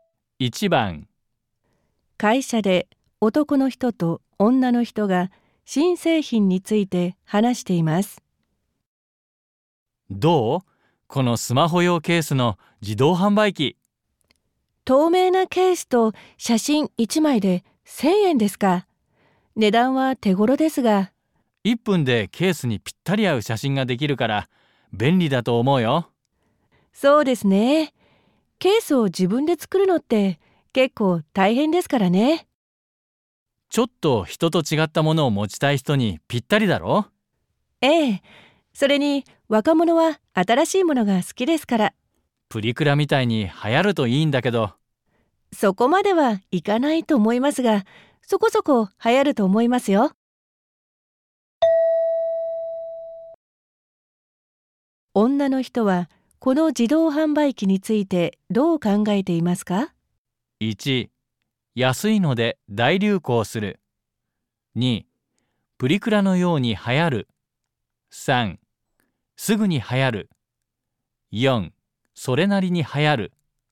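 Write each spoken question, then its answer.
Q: 女の人はこの自動販売機についてどう考えていますか?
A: 4: それなりに流行る。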